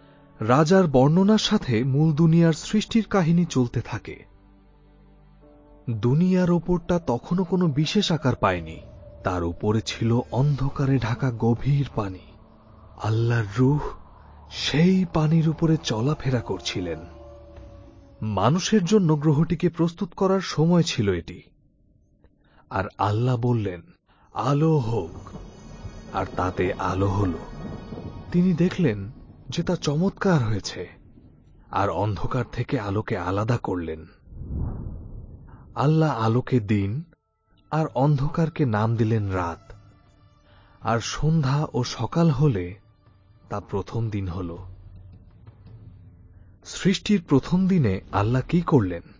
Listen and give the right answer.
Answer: তিনি অন্ধকার থেকে আলোকে আলাদা করলেন।